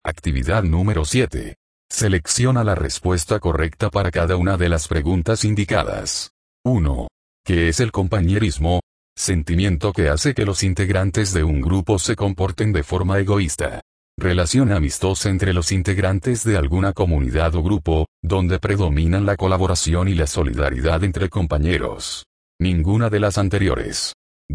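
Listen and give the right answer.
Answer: B: Relación amistosa entre los integrantes de alguna comunidad o grupo, donde predominan la colaboración y la solidaridad entre compañeros.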